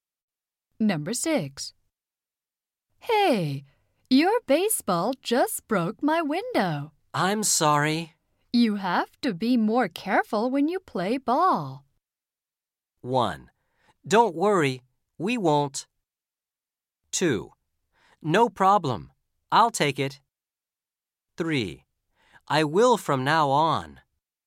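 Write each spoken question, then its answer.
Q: You have to be more careful when you play ball.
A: 3: I will from now on.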